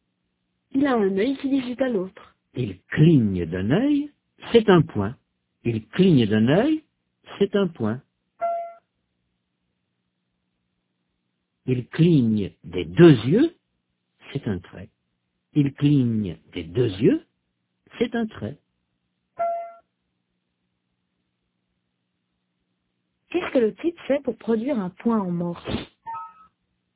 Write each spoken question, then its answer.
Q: Qu'est-ce que le type fait pour produire un point en morse?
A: Il cligne d'un œil.